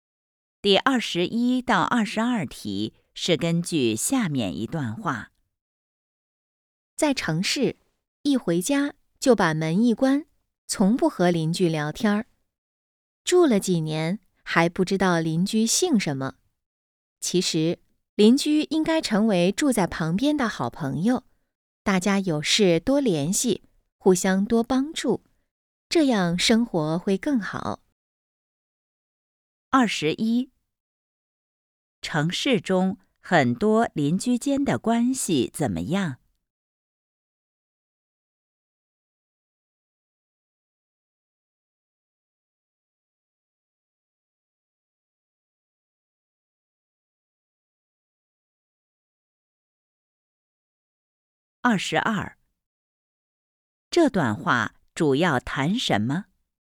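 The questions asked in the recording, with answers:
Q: 城市中很多邻居间的关系怎么样?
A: 不熟悉,很少联系

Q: 这段话主要谈什么?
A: 邻居关系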